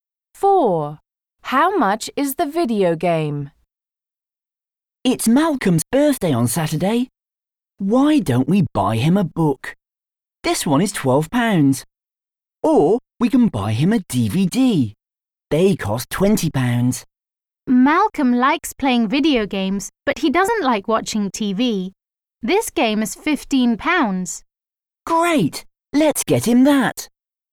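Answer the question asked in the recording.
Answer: £15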